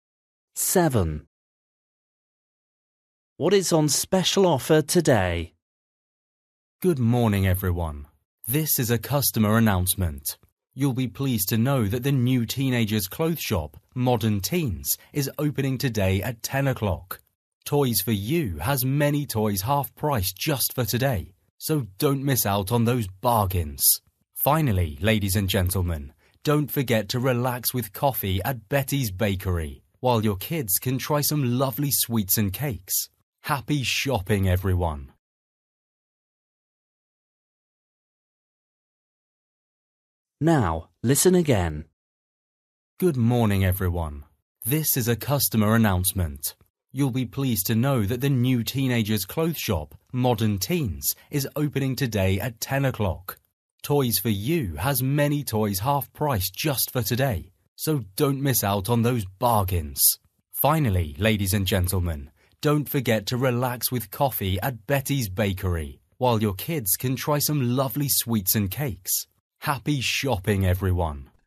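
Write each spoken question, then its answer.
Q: What is on special offer today?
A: toys (half price)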